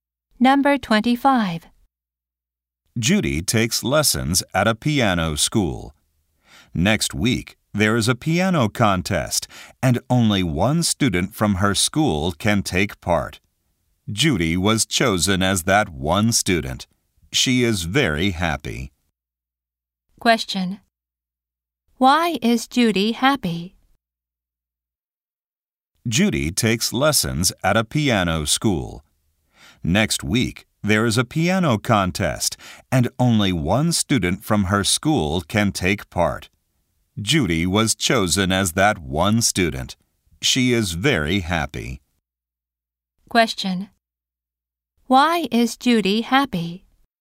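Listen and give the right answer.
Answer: She was chosen to take part in the piano contest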